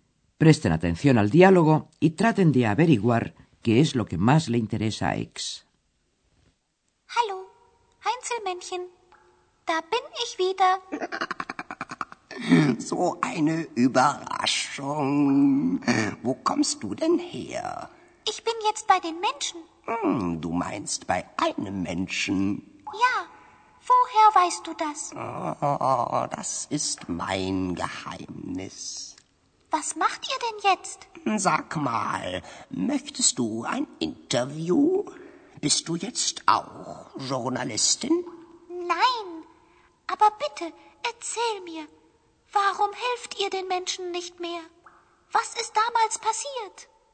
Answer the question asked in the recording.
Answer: Lo que más le interesa a X es justamente lo que ya les dije antes, saber la razón por la cual los duendes han dejado de ayudar a los hombres.